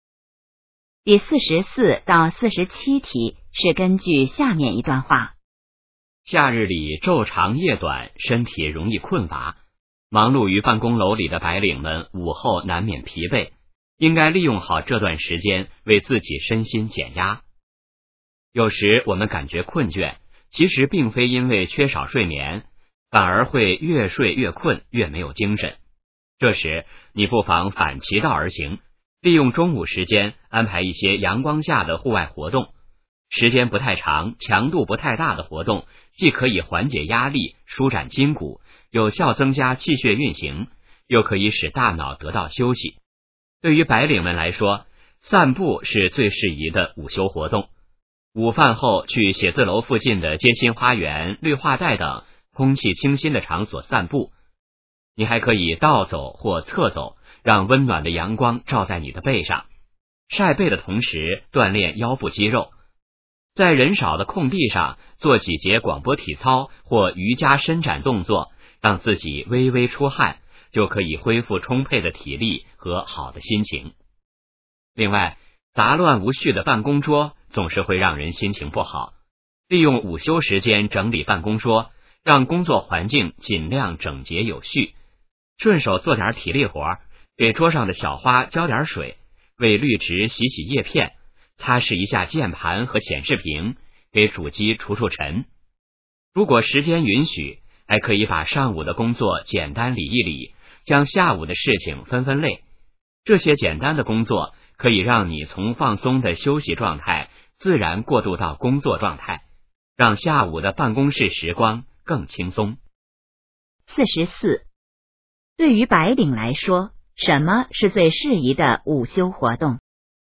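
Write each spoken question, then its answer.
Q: 对于白领来说,什么是最适宜的午休活动?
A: 散步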